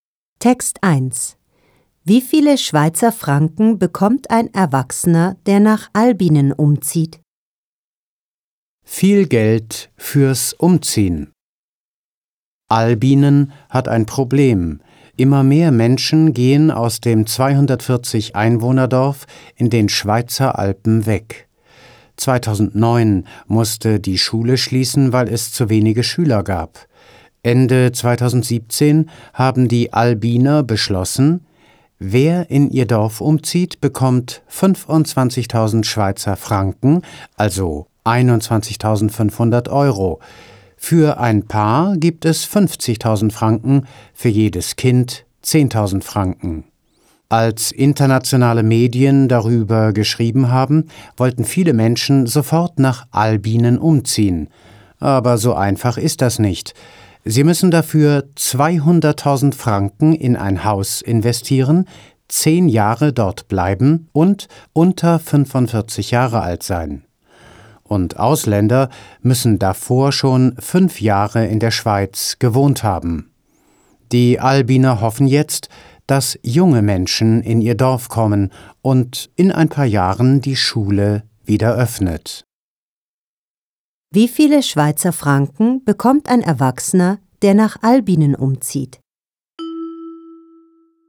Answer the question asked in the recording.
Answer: Er bekommt 25.000 Schweizer Franken.